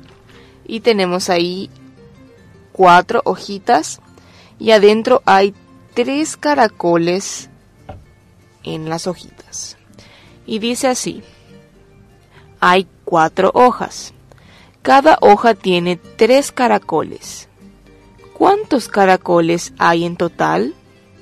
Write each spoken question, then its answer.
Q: ¿Cuántos caracoles hay en total?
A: En total hay 12 caracoles.